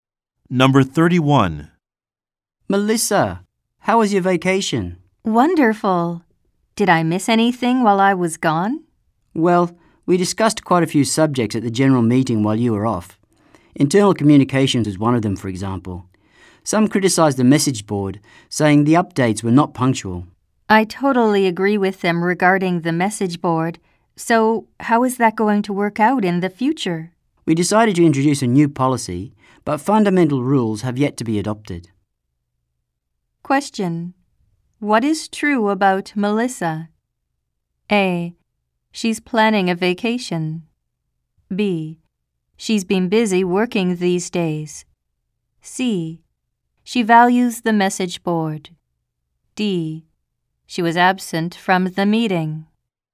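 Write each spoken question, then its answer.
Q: What is true about Melissa?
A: D: She was absent from the meeting.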